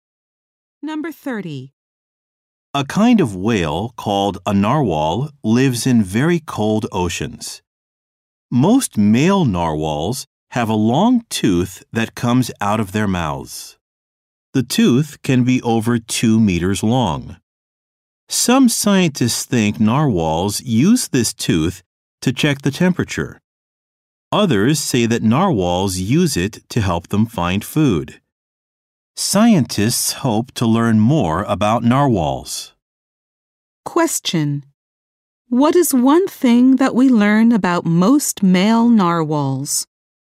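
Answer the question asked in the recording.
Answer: They have a long tooth coming out of their mouths.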